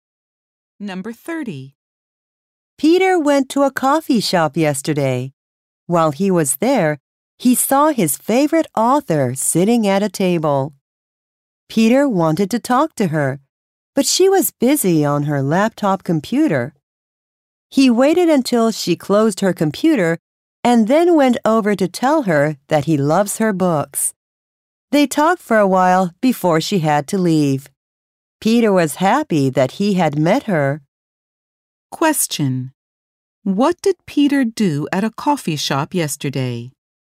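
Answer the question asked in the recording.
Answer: Talked to his favorite author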